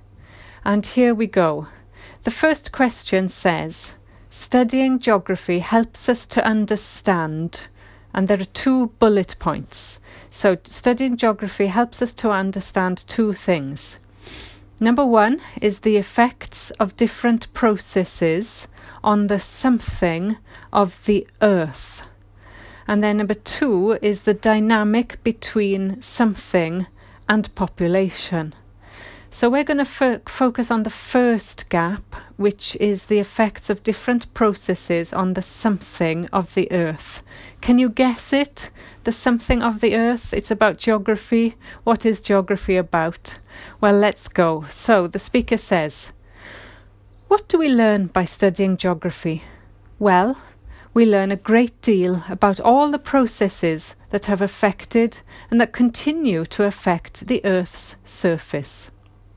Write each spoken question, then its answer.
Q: the effects of different processes on the something of the earth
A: the answer there was the Earth's surface